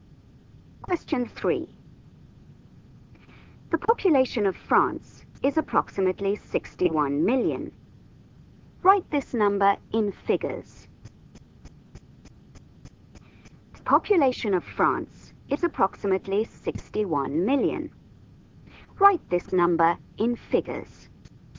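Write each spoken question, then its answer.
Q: The population of France is approximately 61 million. Write this number in figures.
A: 61,000,000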